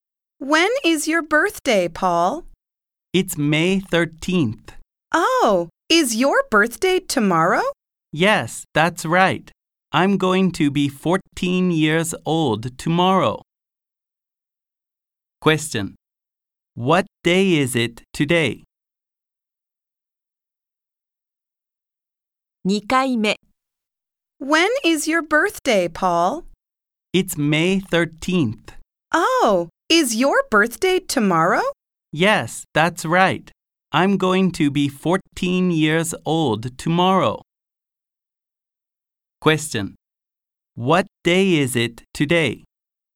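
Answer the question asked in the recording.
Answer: May 12th.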